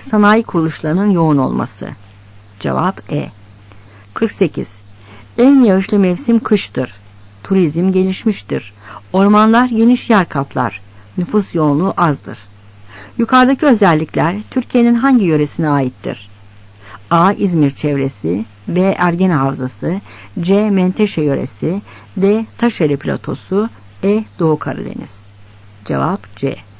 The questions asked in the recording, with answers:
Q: Yukarıdaki özellikler Türkiye'nin hangi yöresine aittir?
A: Cevap C.